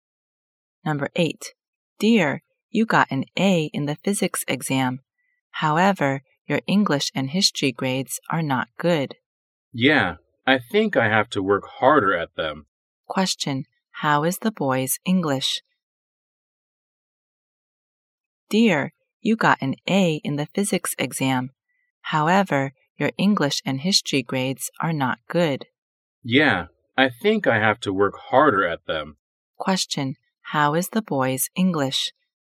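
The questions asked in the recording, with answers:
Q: Question, how is the boy's English?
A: It is not good.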